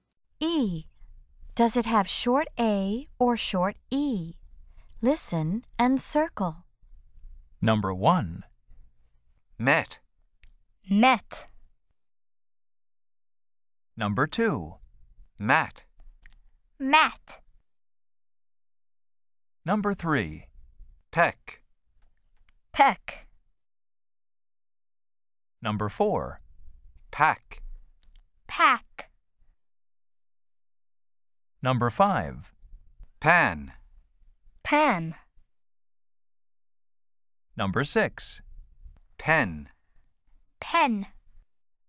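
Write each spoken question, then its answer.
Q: Peck.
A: short E

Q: Pack.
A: short A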